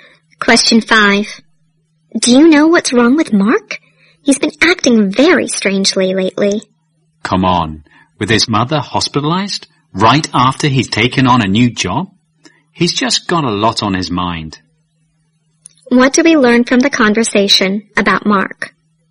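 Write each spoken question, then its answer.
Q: What do we learn from the conversation about Mark?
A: He is under a lot of stress: his mother is in hospital and he has just started a new job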